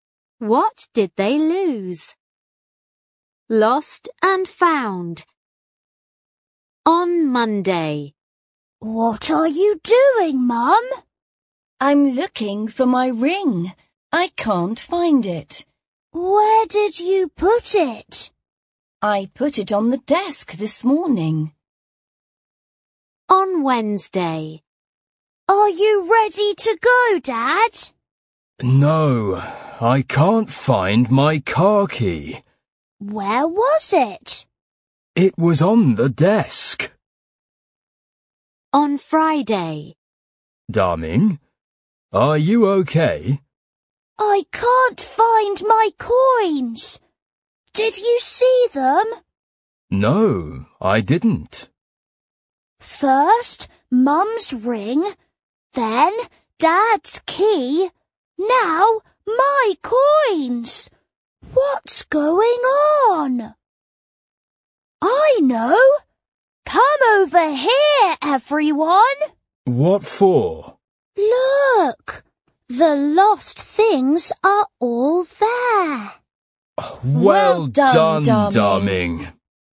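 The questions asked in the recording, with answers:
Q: What did they lose?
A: Mum lost her ring, Dad lost his car key, and the child lost their coins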